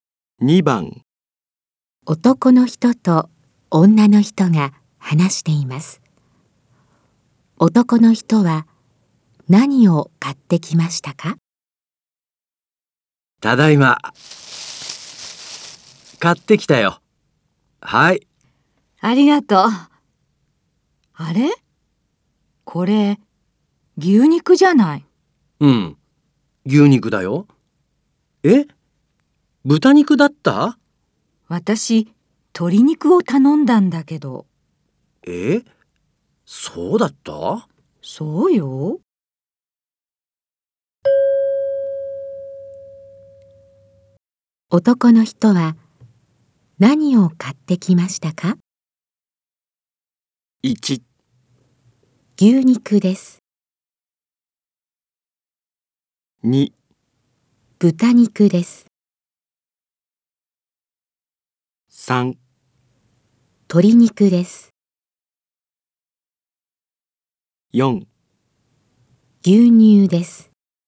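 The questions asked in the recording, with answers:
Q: 男の人は何を買ってきましたか?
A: 1: 牛肉です。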